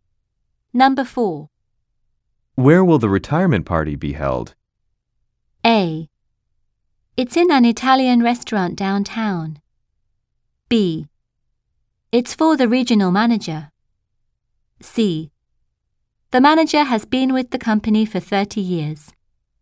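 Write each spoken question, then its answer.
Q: Where will the retirement party be held?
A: A: It's in an Italian restaurant downtown.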